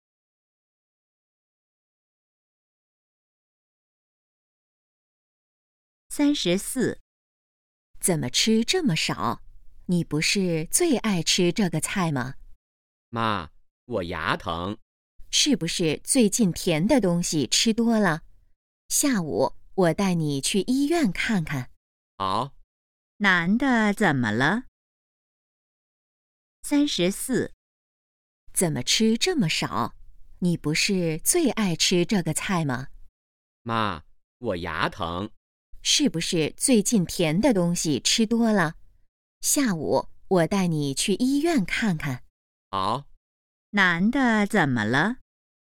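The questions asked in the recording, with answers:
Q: 男的怎么了?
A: 牙疼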